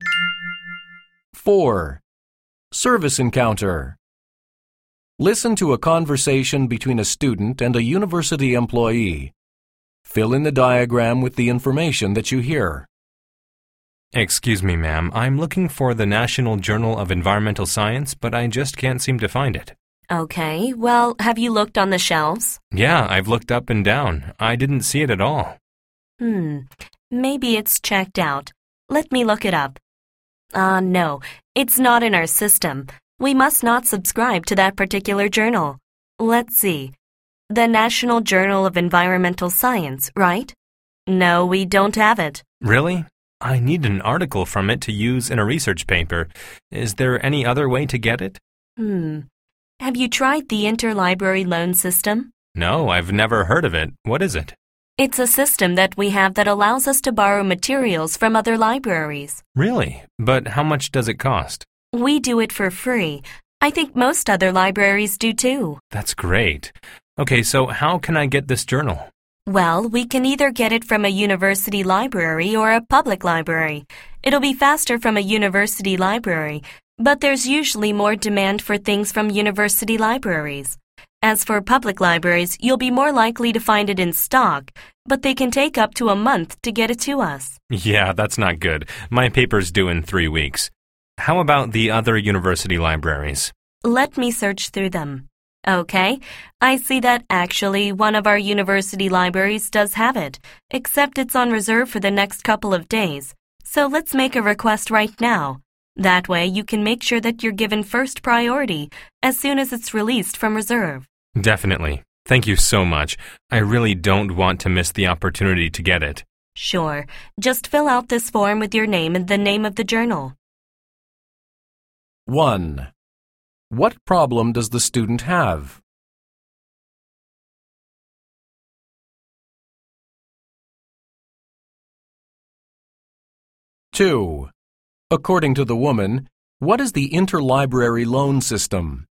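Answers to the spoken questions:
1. He can't find the National Journal of Environmental Science, which the library doesn't have, and he needs an article from it for a research paper.
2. A free system that lets the library borrow materials from other libraries.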